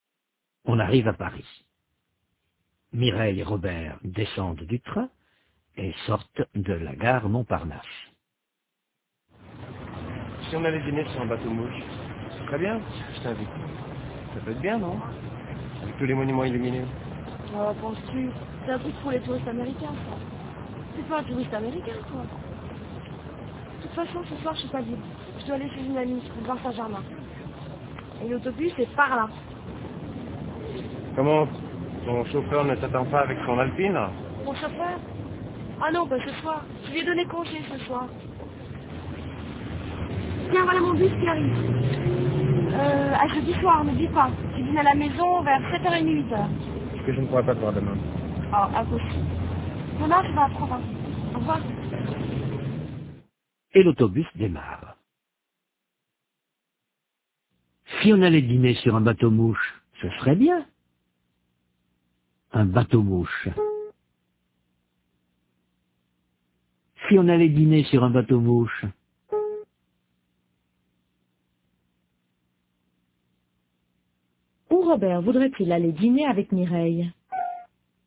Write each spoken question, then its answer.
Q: Où Robert voudrait-il aller dîner avec Mireille?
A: Sur un bateau mouche.